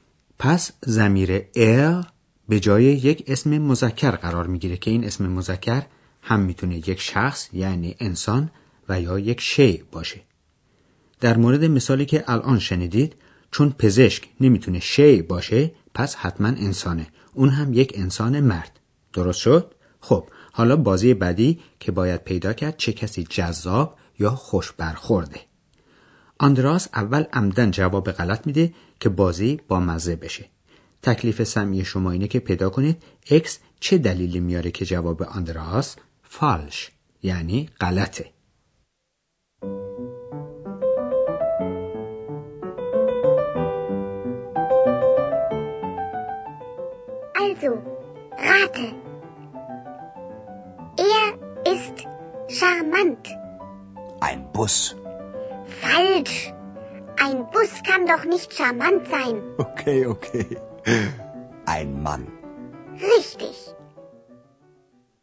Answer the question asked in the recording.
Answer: واقعا هم اکس توضیحی رو که آندراس انتظارش رو داشت میده و میگه اتوبوس که نمیتونه جذاب باشه.